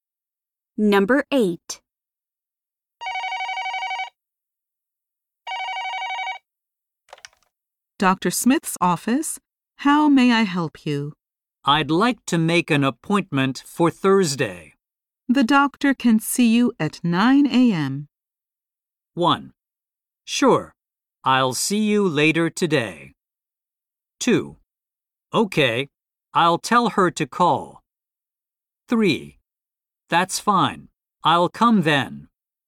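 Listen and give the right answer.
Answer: 3: That's fine, I'll come then.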